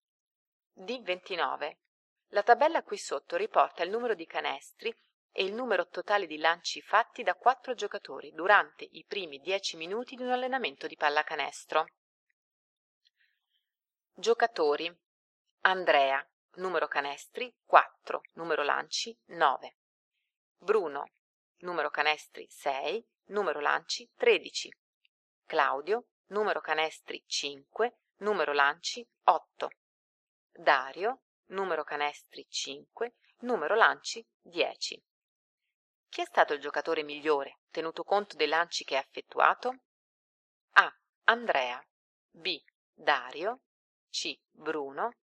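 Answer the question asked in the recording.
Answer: D: Claudio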